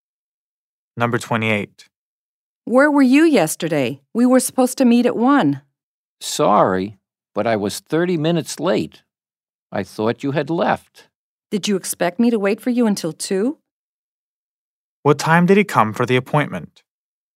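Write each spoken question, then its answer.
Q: What time did he come for the appointment?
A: 1:30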